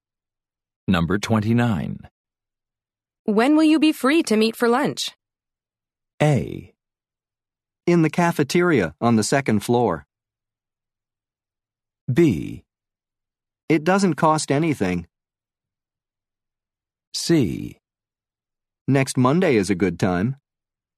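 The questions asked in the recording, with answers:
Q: When will you be free to meet for lunch?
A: C: Next Monday is a good time.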